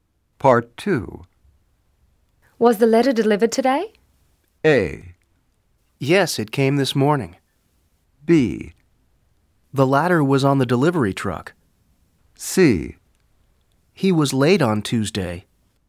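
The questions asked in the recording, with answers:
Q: Was the letter delivered today?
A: A: Yes, it came this morning.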